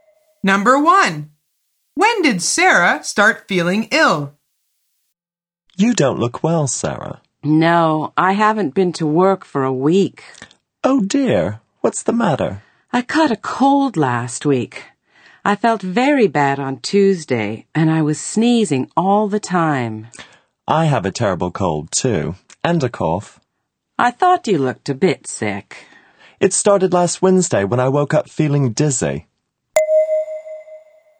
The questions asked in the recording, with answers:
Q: When did Sarah start feeling ill?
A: The answer is last Tuesday.